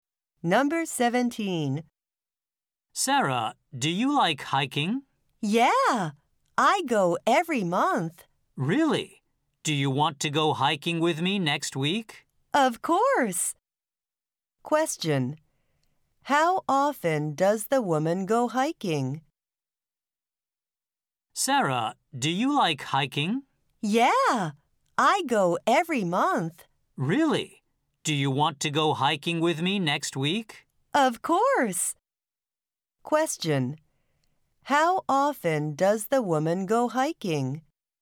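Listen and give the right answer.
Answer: Every month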